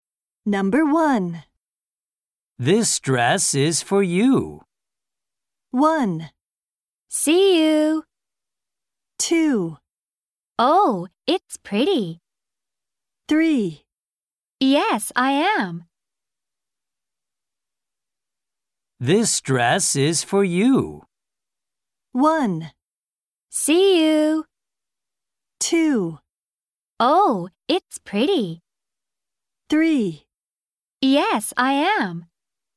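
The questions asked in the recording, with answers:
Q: This dress is for you.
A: 2: Oh, it's pretty.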